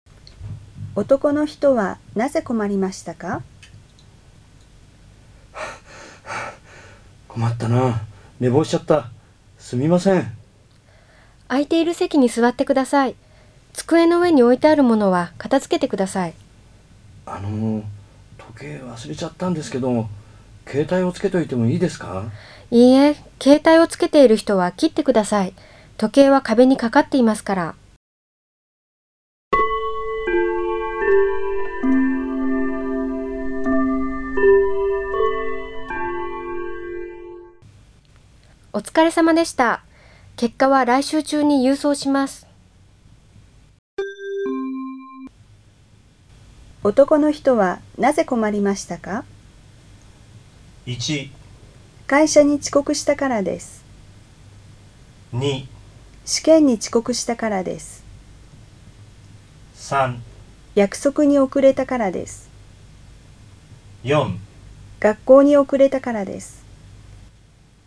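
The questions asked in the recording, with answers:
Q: 男の人はなぜ困りましたか?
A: 2: 試験に遅刻したからです。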